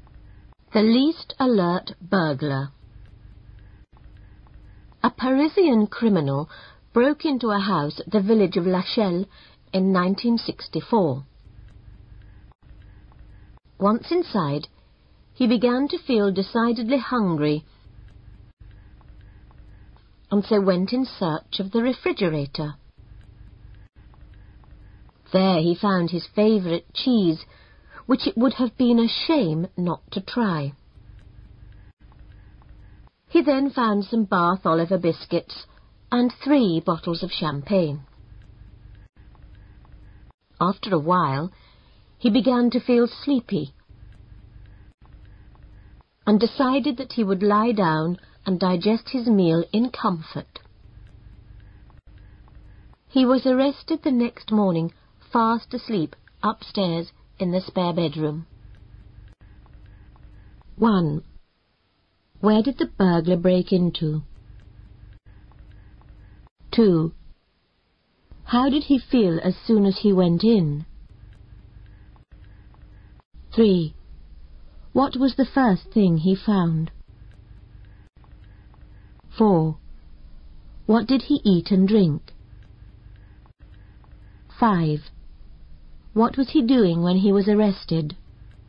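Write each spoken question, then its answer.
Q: Where did the burglar break into?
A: A house in the village of Lachelle

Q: How did he feel as soon as he went in?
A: Decidedly hungry

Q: What was the first thing he found?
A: His favourite cheese

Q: What did he eat and drink?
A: Cheese, Bath Oliver biscuits and 3 bottles of champagne

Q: What was he doing when he was arrested?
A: Sleeping in the spare bedroom upstairs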